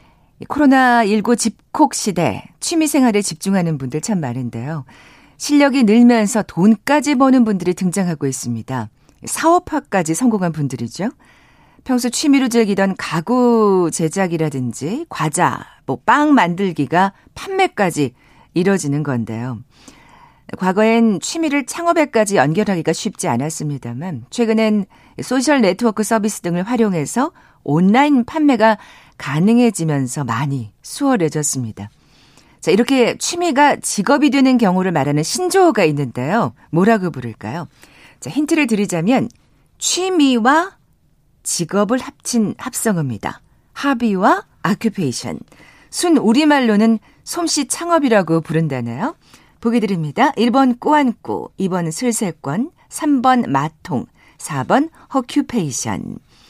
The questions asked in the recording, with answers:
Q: 자, 이렇게 취미가 직업이 되는 경우를 말하는 신조어가 있는데요. 뭐라고 부를까요?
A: 자, 오늘 비퀴즈 정답은 4번 허큐페이션이었죠.